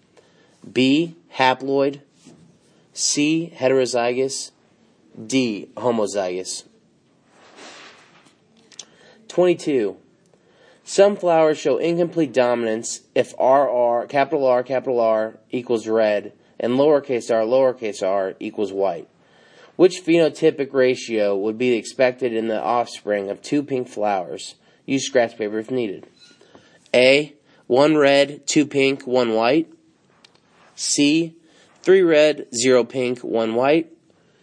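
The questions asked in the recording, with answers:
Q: Which phenotypic ratio would be expected in the offspring of two pink flowers?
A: A: 1 red, 2 pink, 1 white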